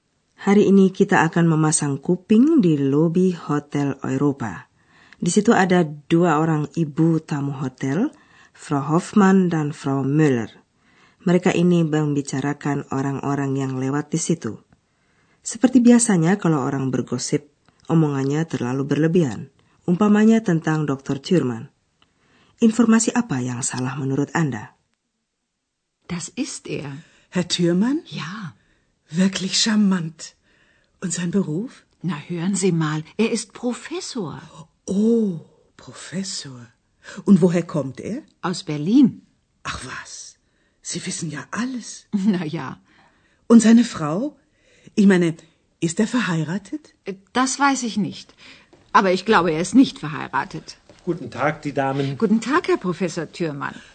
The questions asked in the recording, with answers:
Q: Informasi apa yang salah menurut Anda?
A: Na, Anda tentu dengar tadi dari seorang dokter, tahu-taunya menjadi profesor, naik pangkatnya.